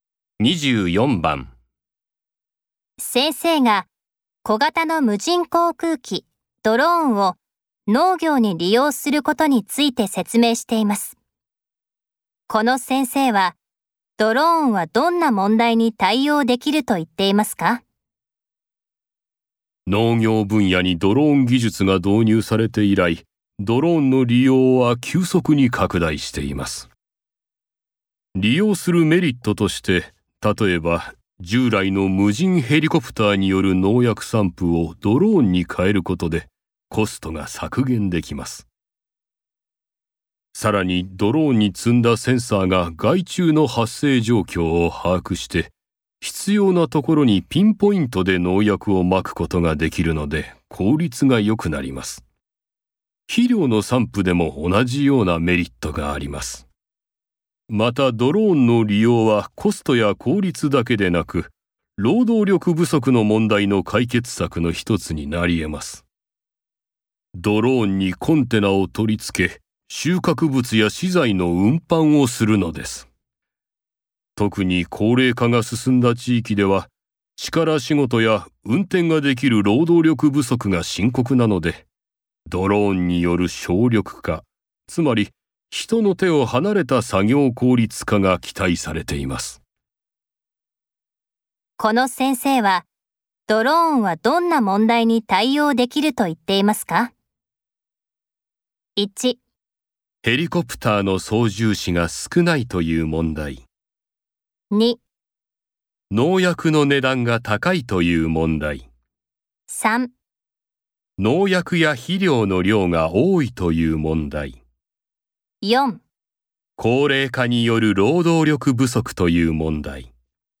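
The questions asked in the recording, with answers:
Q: この先生はドローンはどんな問題に対応できると言っていますか?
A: 4: 高齢化による労働力不足という問題。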